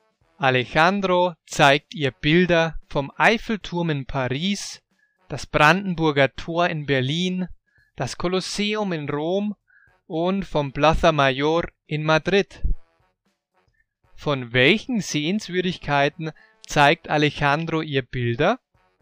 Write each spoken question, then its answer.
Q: Von welchen Sehenswürdigkeiten zeigt Alejandro ihr Bilder?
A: Er zeigt ihr Bilder vom Eiffelturm in Paris, das Brandenburger Tor in Berlin, das Kolosseum in Rom und vom Plaza Mayor in Madrid.